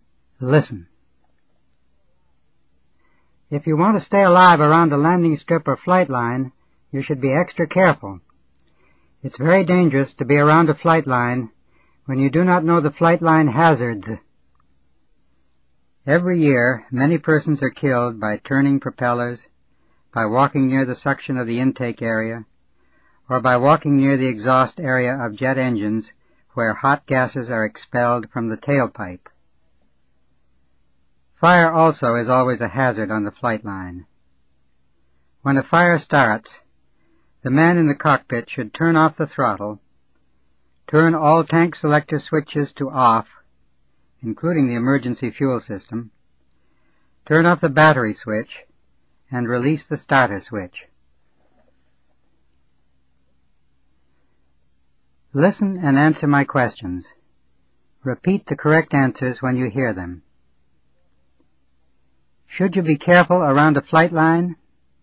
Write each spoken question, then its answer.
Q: Should you be careful around a flight line?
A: Yes, you should be extra careful.